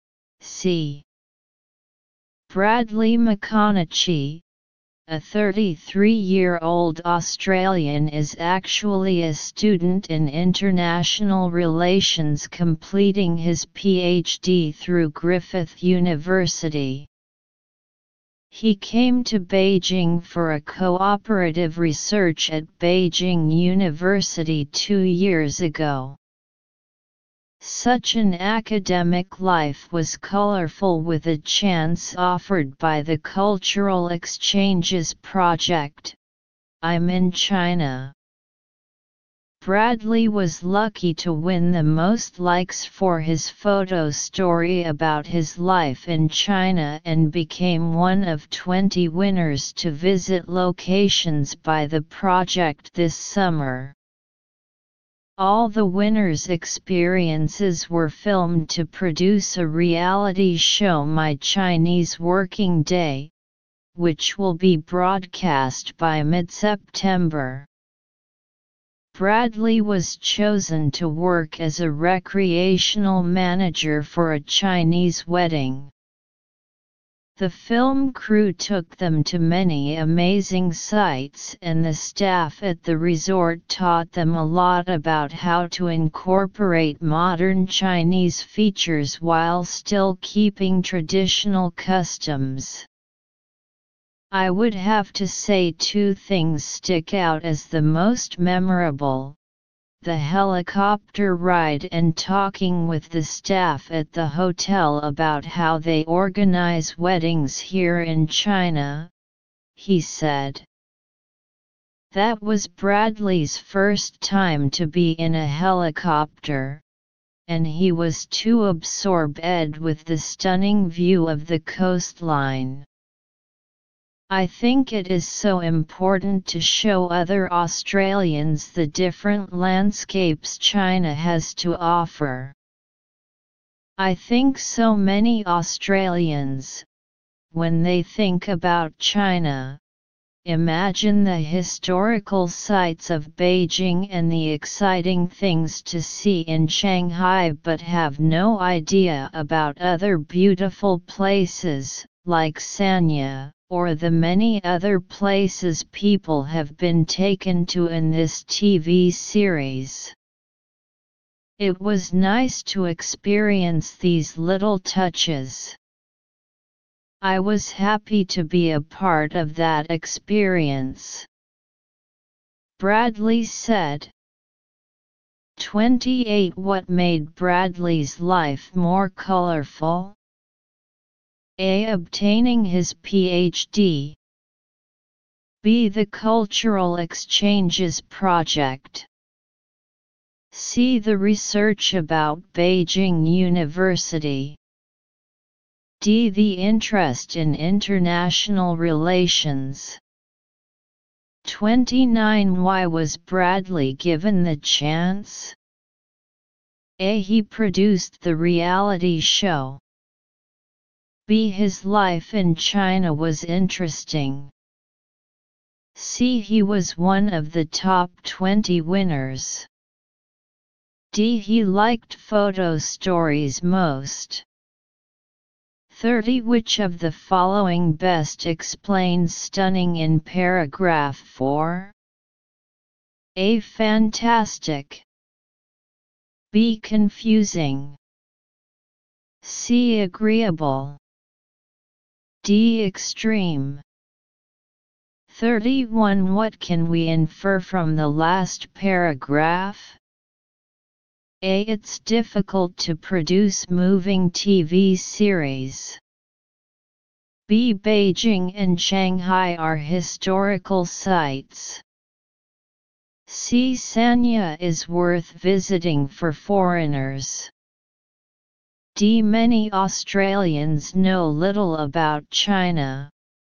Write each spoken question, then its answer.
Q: What made Bradley's life more colorful?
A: 28. B.

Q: Why was Bradley given the chance?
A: 29. C.

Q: Which of the following best explains stunning in paragraph 4?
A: 30. A.